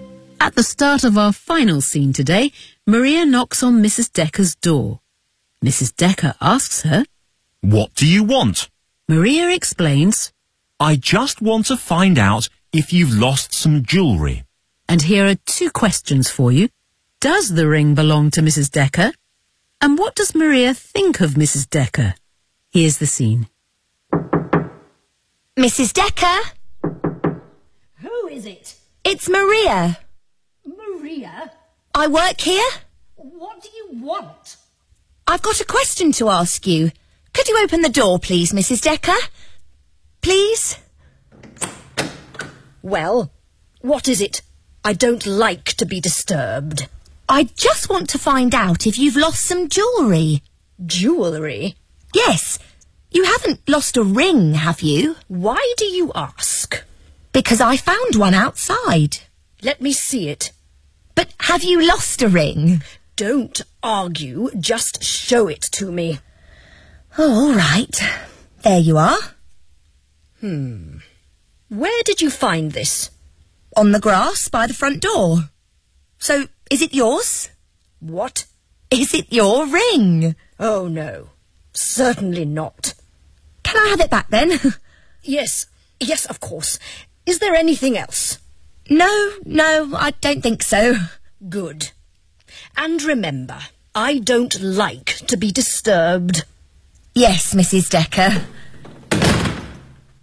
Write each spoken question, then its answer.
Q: Does the ring belong to Mrs. Decker?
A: No.